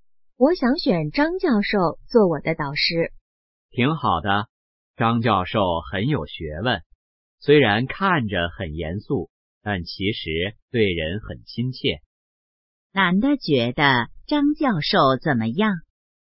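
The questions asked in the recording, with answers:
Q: 男的觉得张教授怎么样?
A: 很有学问,对人很亲切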